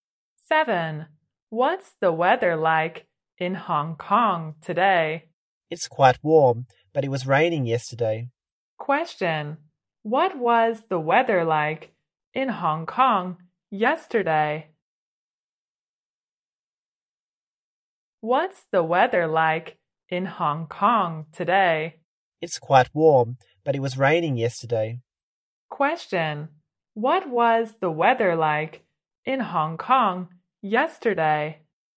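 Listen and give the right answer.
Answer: Rainy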